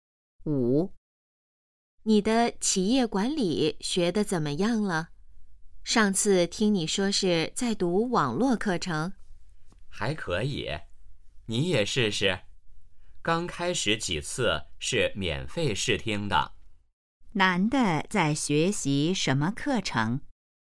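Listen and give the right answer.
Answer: 企业管理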